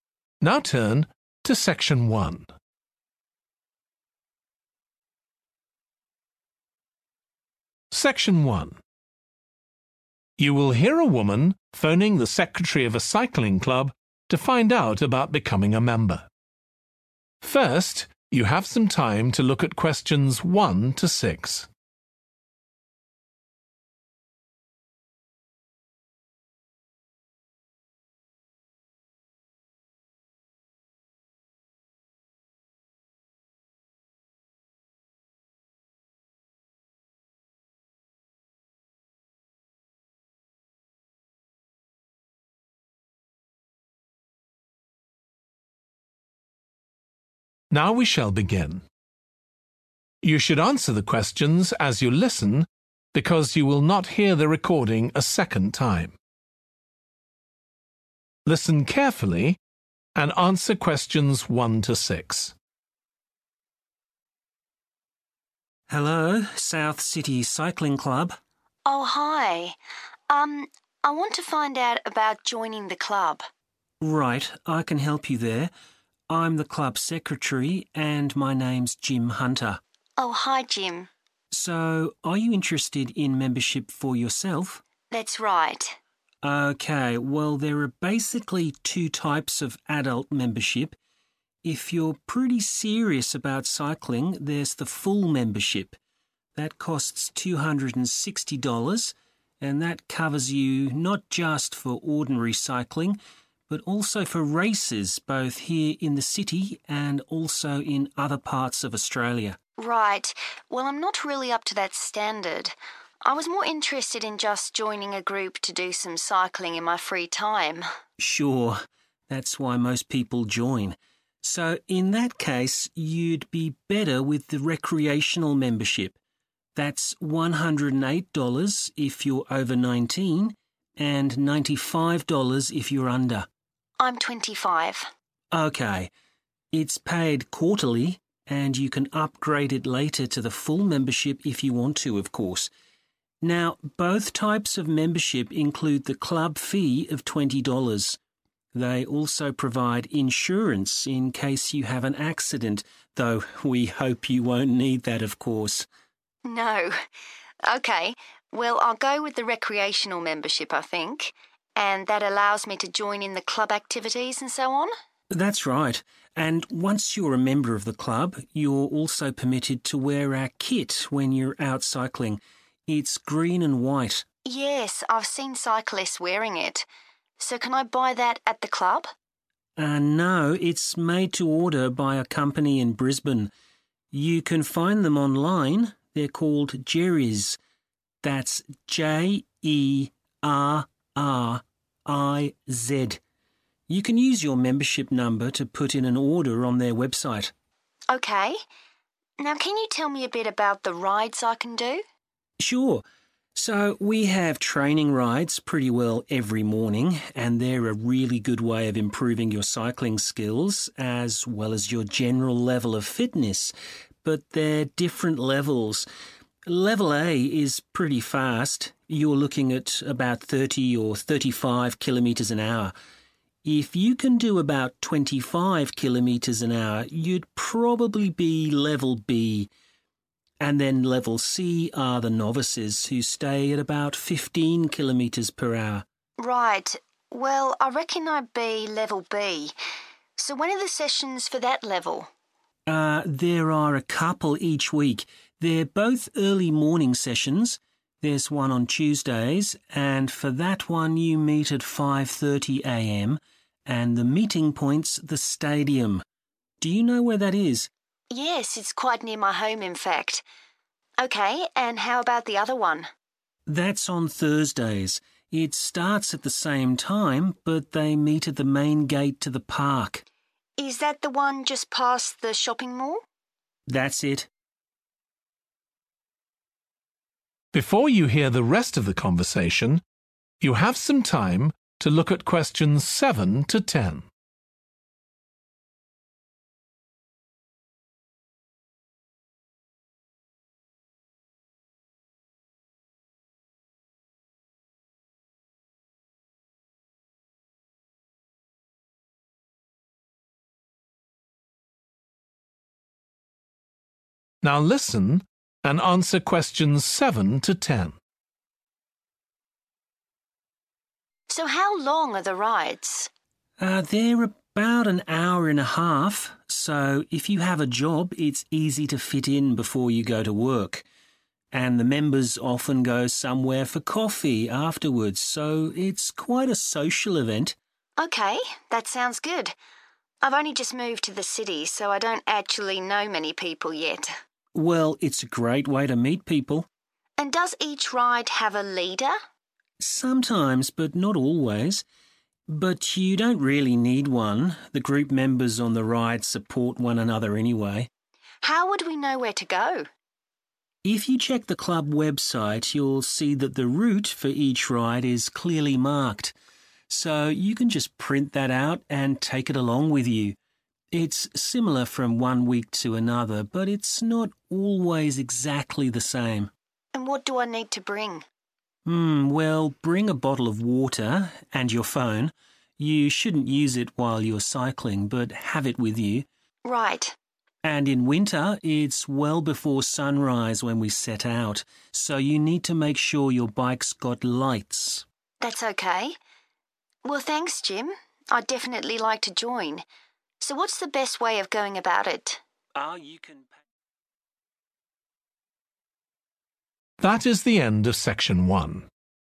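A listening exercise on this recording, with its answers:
Complete the notes below. Write ONE WORD OR A NUMBER.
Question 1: Full membership costs $260; this covers cycling and (1) all over Australia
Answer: races

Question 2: Cost of membership includes the club fee and (2)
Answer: insurance

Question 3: The club kit is made by a company called (3)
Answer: Jerriz

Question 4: Level B: speed about (4) kph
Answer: 25

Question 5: Tuesdays at 5.30 am, meet at the (5)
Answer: stadium

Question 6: Thursdays at 5.30 am, meet at the entrance to the (6)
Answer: park

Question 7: Members often have (7) together afterwards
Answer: coffee

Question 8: There is not always a (8) with the group on these rides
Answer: leader

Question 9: Check and print the (9) on the website beforehand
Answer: route

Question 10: Bikes must have (10)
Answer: lights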